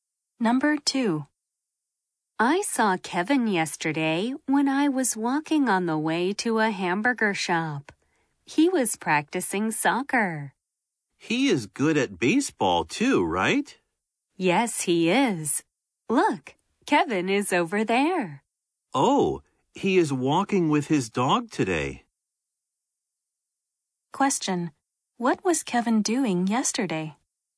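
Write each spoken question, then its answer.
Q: What was Kevin doing yesterday?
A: He was practicing soccer.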